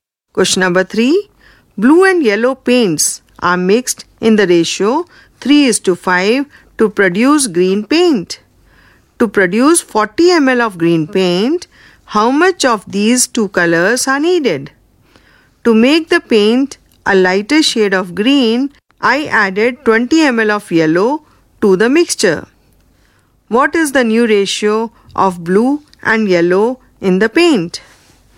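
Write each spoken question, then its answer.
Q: To produce 40 ml of green paint, how much of these two colors are needed?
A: 15 ml blue and 25 ml yellow

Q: What is the new ratio of blue and yellow in the paint?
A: 15:45, that is 1:3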